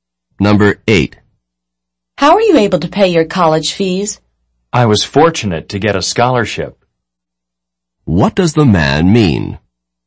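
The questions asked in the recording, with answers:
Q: What does the man mean?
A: A scholarship pays his college fees.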